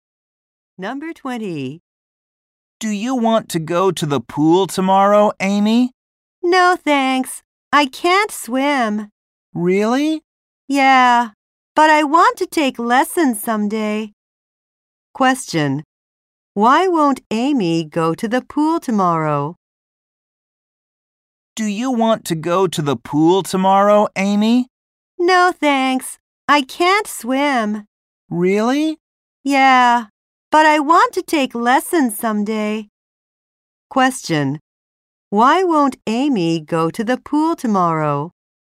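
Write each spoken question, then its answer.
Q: Why won't Amy go to the pool tomorrow?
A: She can't swim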